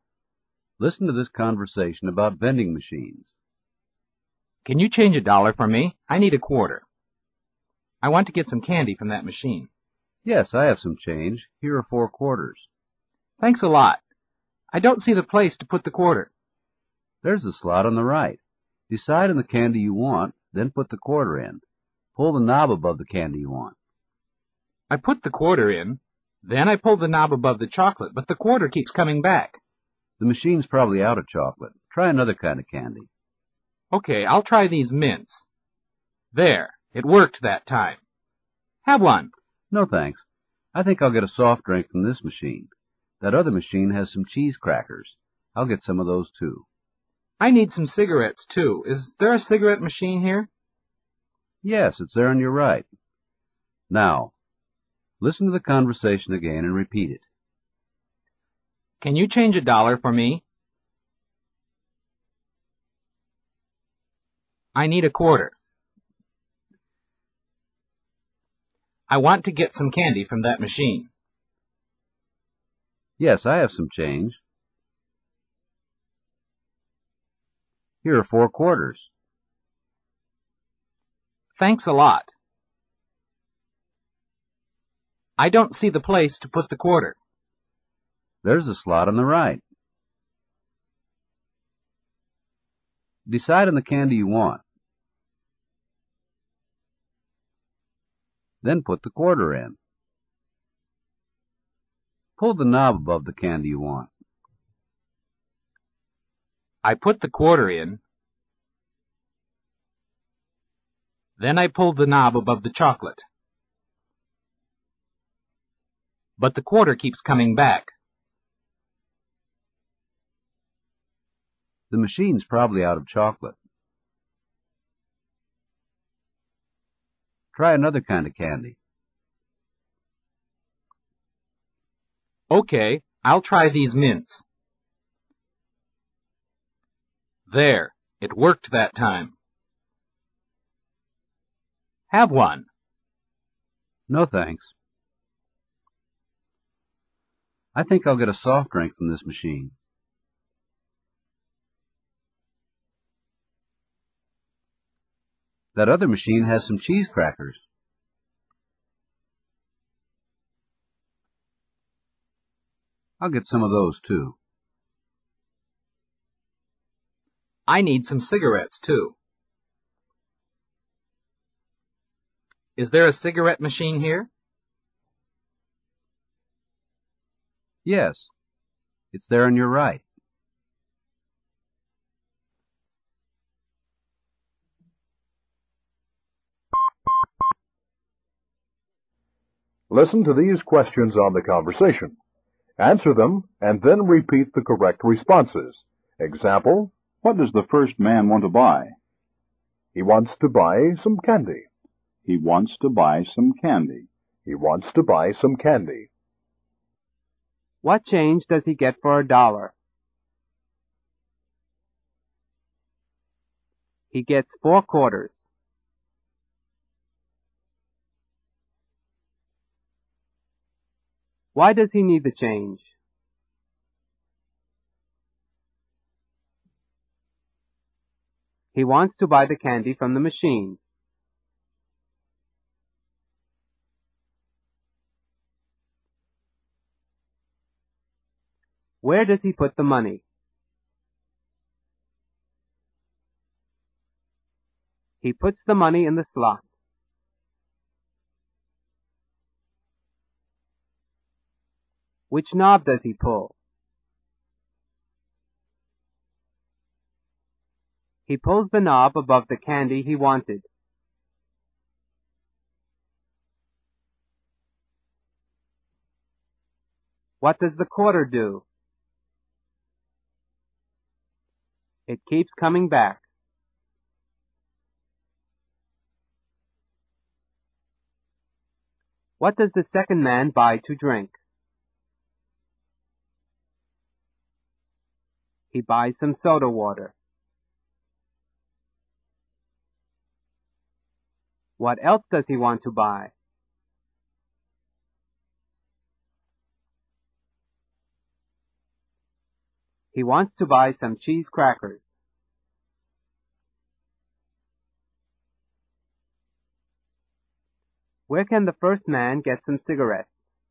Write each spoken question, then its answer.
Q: What change does he get for a dollar?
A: He gets four quarters.

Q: Why does he need the change?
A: He wants to buy the candy from the machine.

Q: Where does he put the money?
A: He puts the money in the slot.

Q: Which knob does he pull?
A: He pulls the knob above the candy he wanted.

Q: What does the quarter do?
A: It keeps coming back.

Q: What does the second man buy to drink?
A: He buys some soda water.

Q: Where can the first man get some cigarettes?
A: He can get some from the cigarette machine.